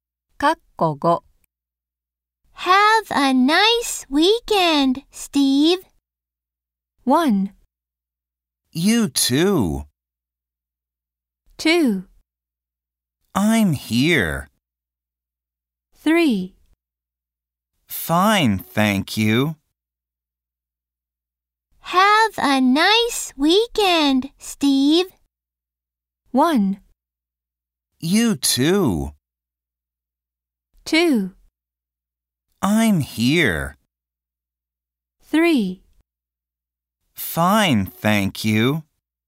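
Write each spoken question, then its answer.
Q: Have a nice weekend, Steve.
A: 1: You too.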